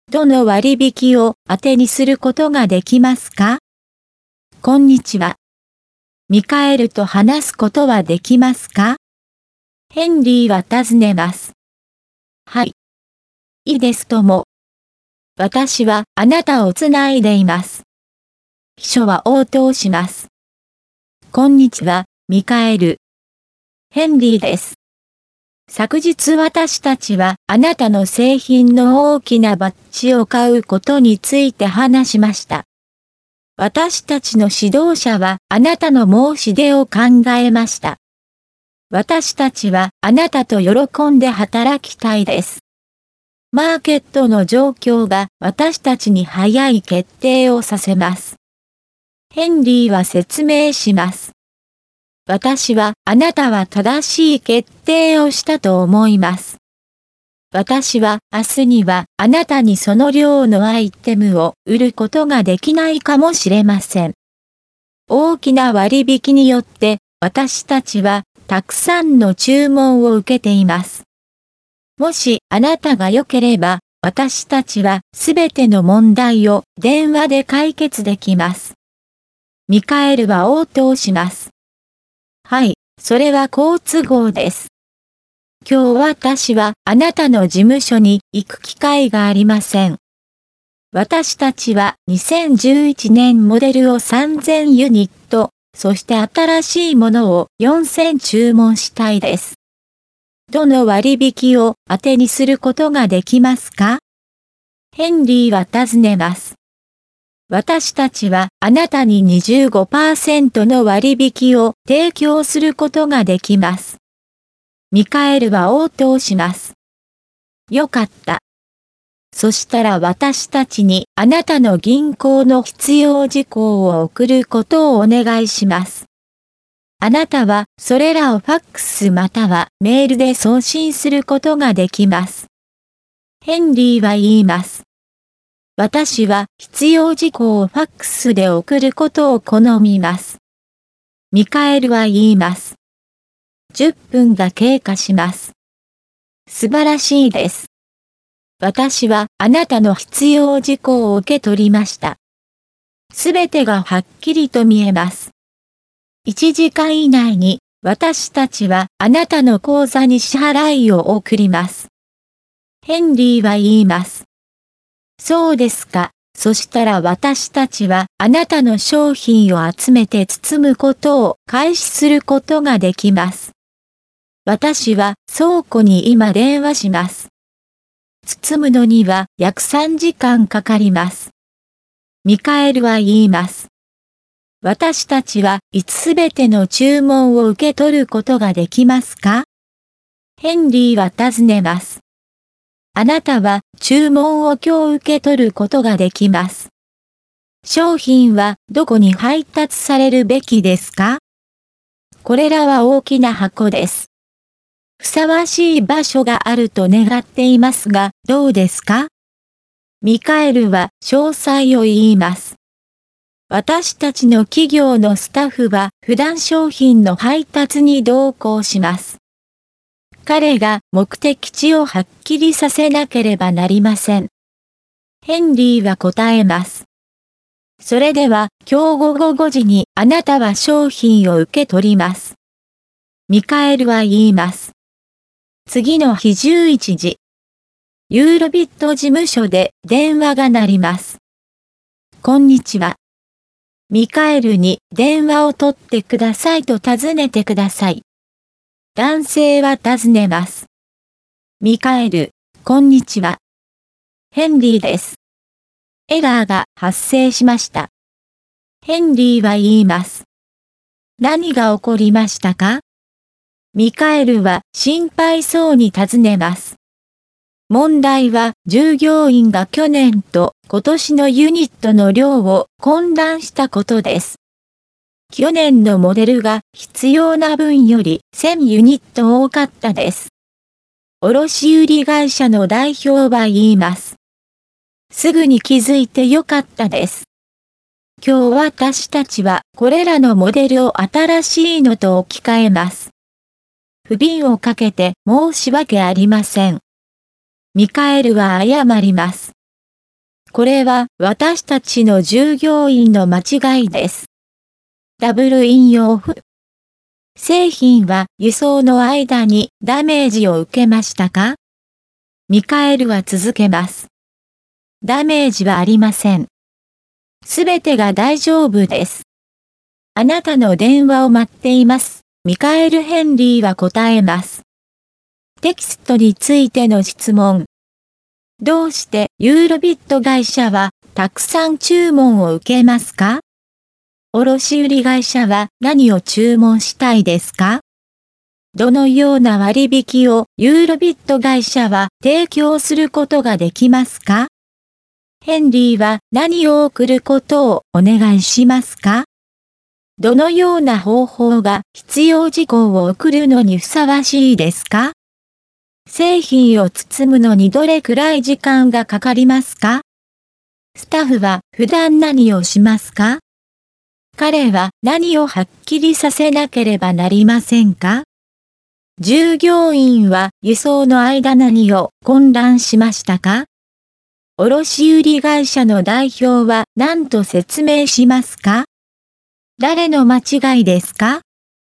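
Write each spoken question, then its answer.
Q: どうしてユーロビット会社はたくさん注文を受けますか?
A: 大きな割引のため

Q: 卸売会社は何を注文したいですか?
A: 2011年モデルを3000ユニットと新しいモデルを4000ユニット

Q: どのような割引をユーロビット会社は提供することができますか?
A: 25%の割引

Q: ヘンリーは何を送ることをお願いしますか?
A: 銀行の必要事項

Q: 製品を包むのにどれくらい時間がかかりますか?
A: 約3時間

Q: スタッフは普段何をしますか?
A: 商品の配達に同行する

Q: 彼は何をはっきりさせなければなりませんか?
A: 目的地

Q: 従業員は輸送の間何を混乱しましたか?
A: 去年と今年のモデルのユニットの量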